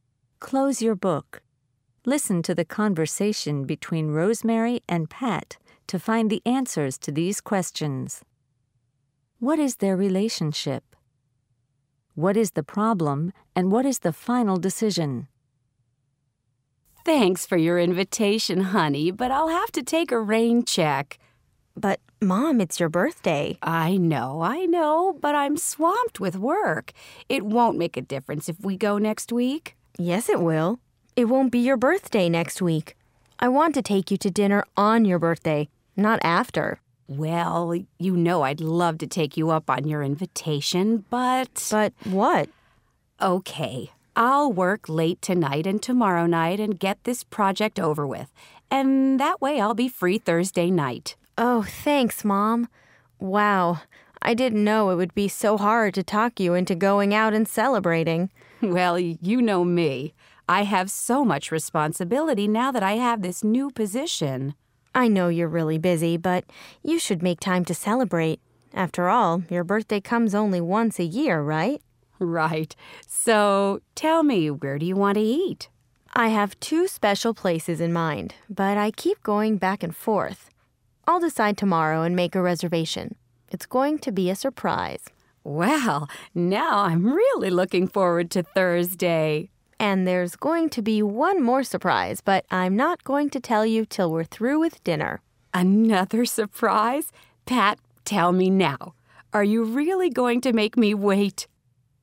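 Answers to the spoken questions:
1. Mother and child (Rosemary is Pat's mom)
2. Mom is too busy with work to go to her birthday dinner; she decides to work late so she can go out Thursday night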